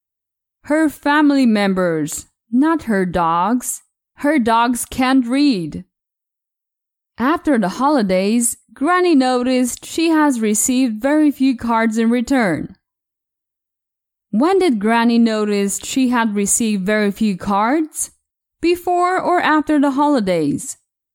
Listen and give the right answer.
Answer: After the holidays.